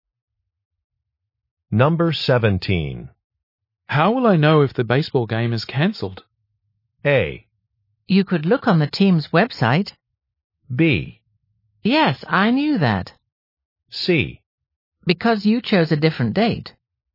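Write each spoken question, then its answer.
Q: How will I know if the baseball game is cancelled?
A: A: You could look on the team's website.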